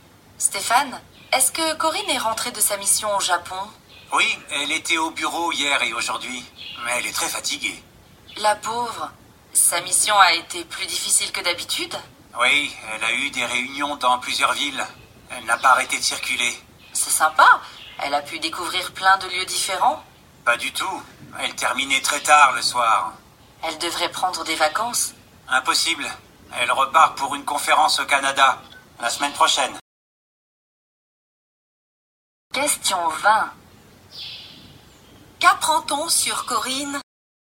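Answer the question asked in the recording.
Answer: Elle est très fatiguée et repart bientôt au Canada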